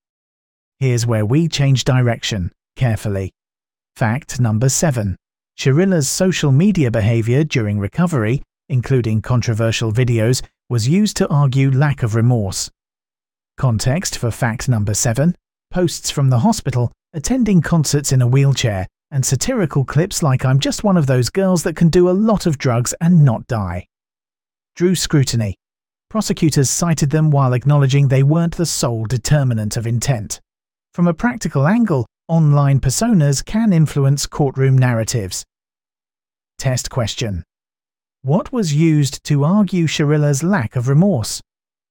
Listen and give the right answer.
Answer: Correct answer, social media behavior